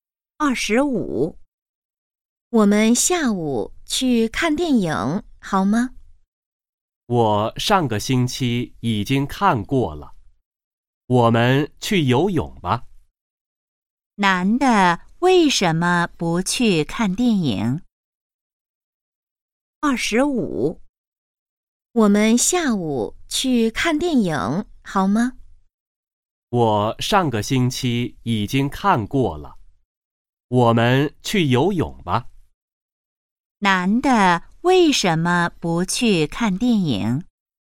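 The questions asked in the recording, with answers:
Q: 男的为什么不去看电影?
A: 上个星期已经看过了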